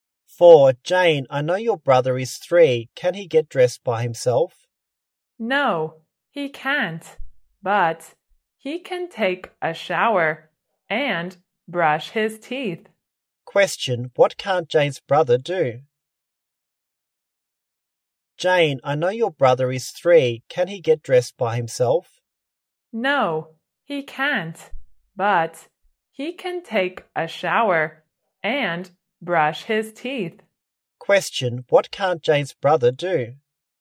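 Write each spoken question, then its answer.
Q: what can't Jane's brother do?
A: Get dressed by himself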